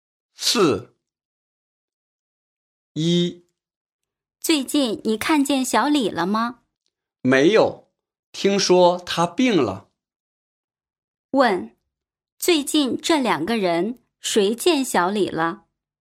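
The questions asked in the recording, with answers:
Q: 问,最近这两个人谁见小李了?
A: 两个人都没见过小李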